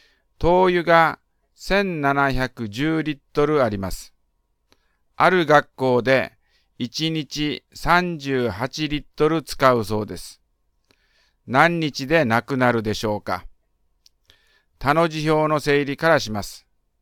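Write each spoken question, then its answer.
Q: 何日でなくなるでしょうか。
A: 45日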